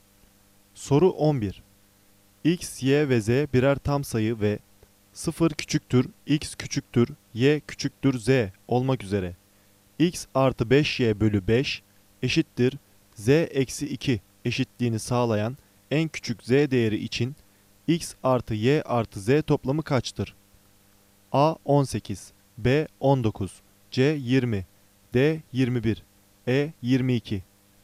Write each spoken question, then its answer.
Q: X artı 5Y bölü 5 eşittir Z eksi 2 eşitliğini sağlayan en küçük Z değeri için X artı Y artı Z toplamı kaçtır?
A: Doğru cevap C 20.